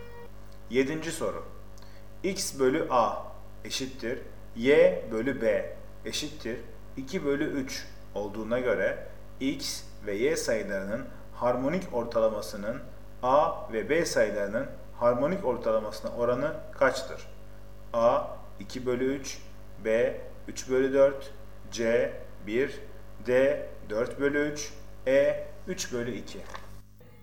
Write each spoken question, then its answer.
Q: X bölü A eşittir Y bölü B eşittir 2 bölü 3 olduğuna göre X ve Y sayılarının harmonik ortalamasının A ve B sayılarının harmonik ortalamasına oranı kaçtır?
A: Doğru cevap A 2 bölü 3.